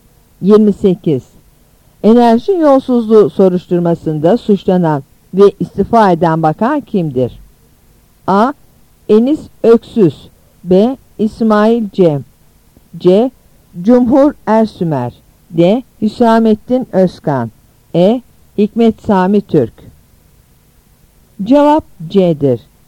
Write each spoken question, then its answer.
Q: Enerji yolsuzluğu soruşturmasında suçlanan ve istifa eden bakan kimdir?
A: Cevap C'dir.